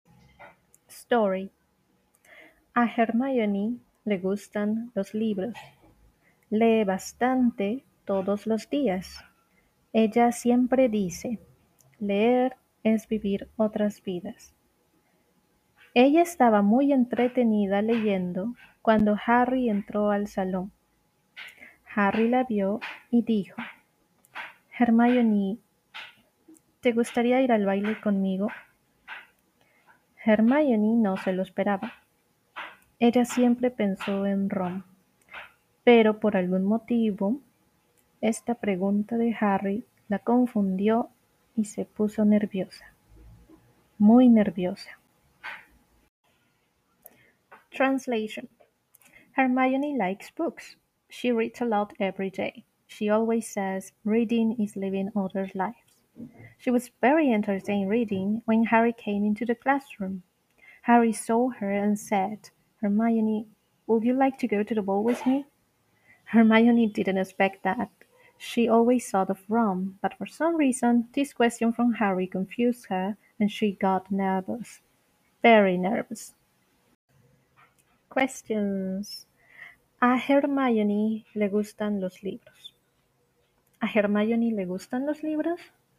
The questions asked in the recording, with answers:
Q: ¿A Hermione le gustan los libros?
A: Sí. A Hermione le gustan los libros.